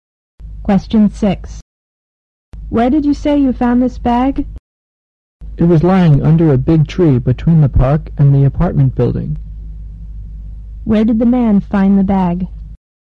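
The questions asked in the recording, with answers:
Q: Where did the man find the bag?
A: Under a big tree between the park and the apartment building.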